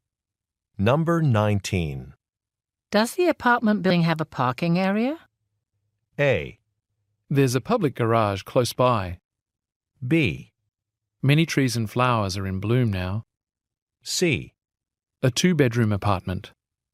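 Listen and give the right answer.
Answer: A: There's a public garage close by.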